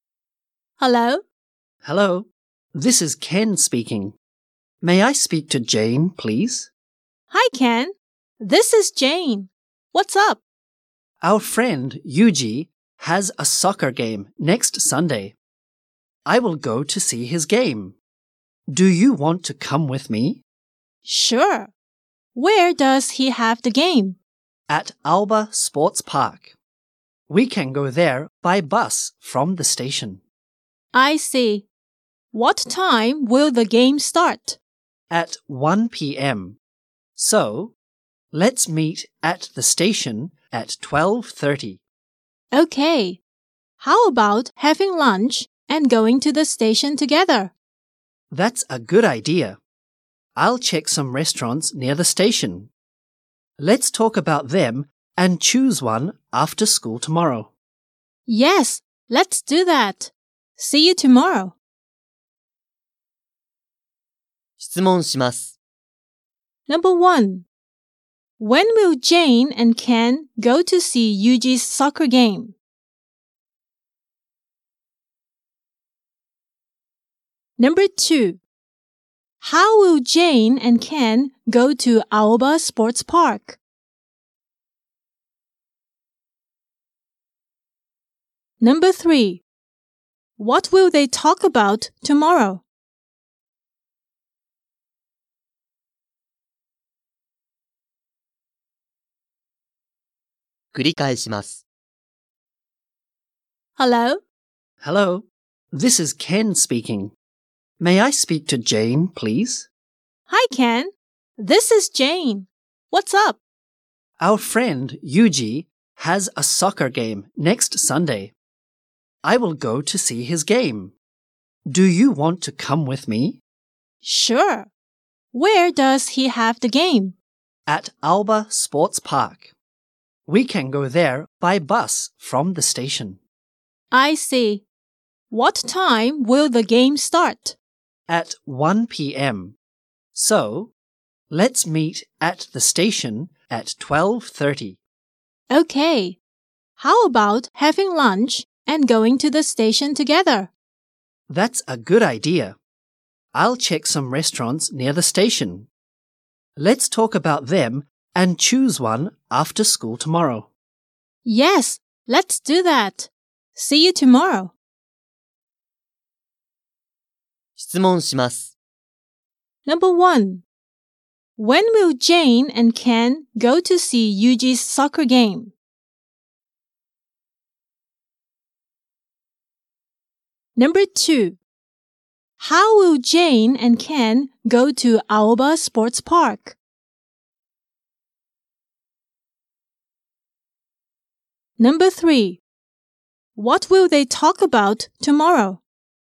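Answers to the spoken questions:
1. Next Sunday
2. By bus from the station
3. Restaurants near the station (to choose one for lunch)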